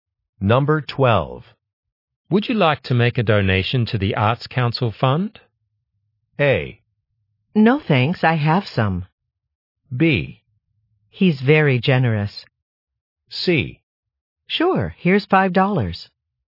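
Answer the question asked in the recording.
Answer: C: Sure, here's $5.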